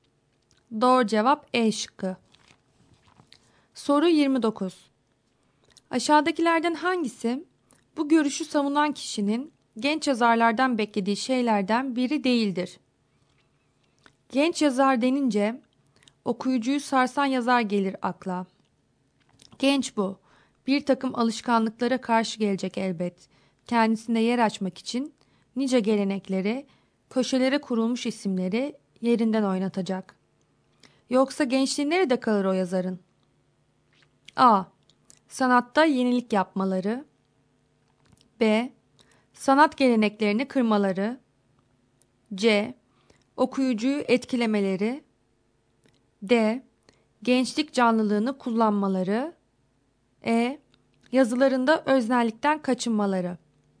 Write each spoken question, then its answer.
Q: Aşağıdakilerden hangisi bu görüşü savunan kişinin genç yazarlardan beklediği şeylerden biri değildir?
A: Doğru cevap E şıkkı.